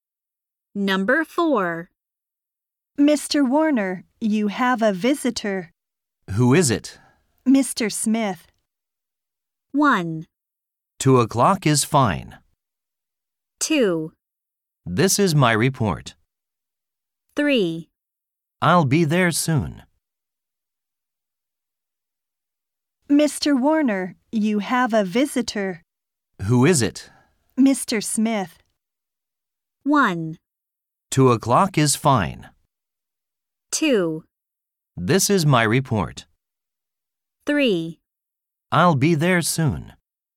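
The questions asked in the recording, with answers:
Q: Mr. Smith.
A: 3: I'll be there soon.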